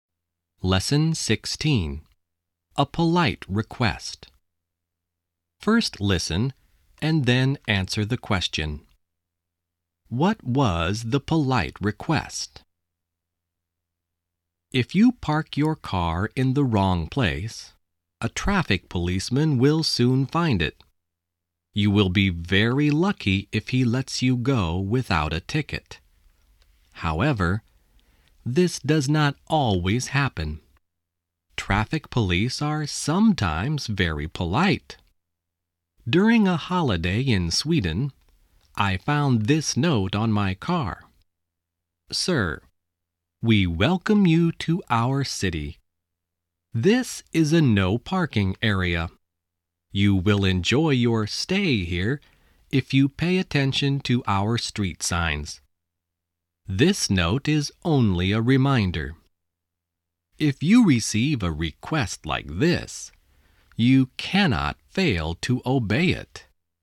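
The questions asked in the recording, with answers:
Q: What was the polite request?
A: To pay attention to the street signs (not to park in a no parking area)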